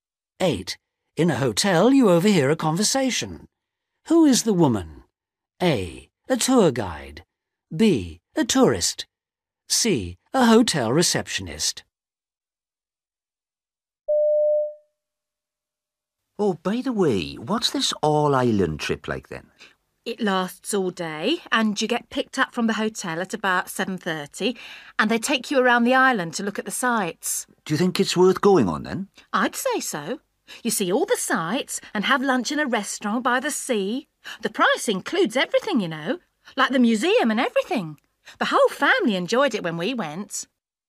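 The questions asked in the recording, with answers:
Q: Who is the woman?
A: B: A tourist.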